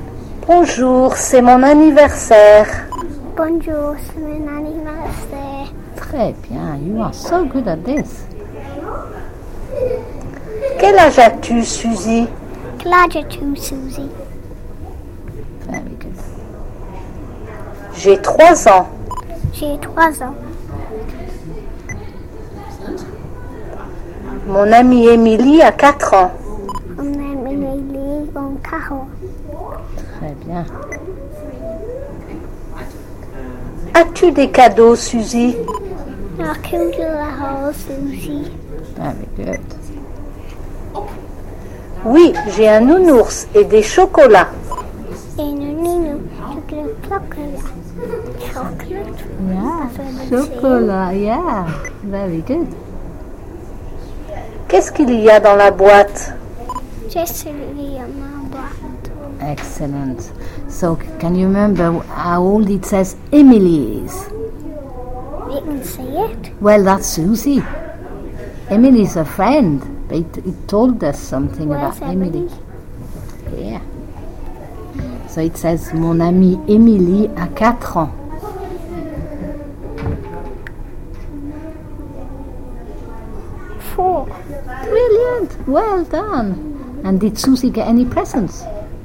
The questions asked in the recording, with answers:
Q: So, can you remember how old it says Emily is?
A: Four.

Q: And did Susie get any presents?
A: She got a nounours, des chocolats.